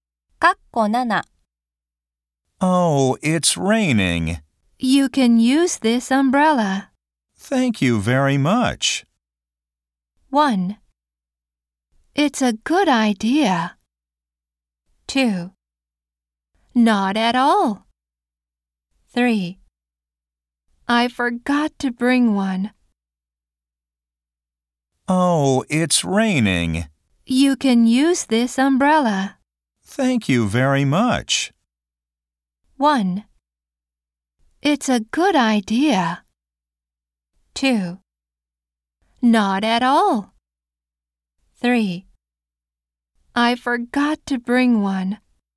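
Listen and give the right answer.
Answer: 2: Not at all.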